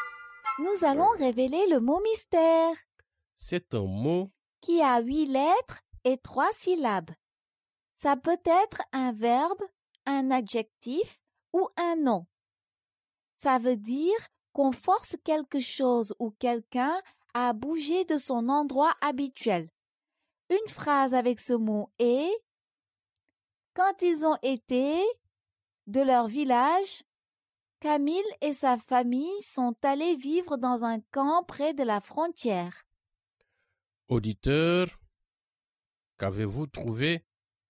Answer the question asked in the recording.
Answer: Le mot mystère est déplacé.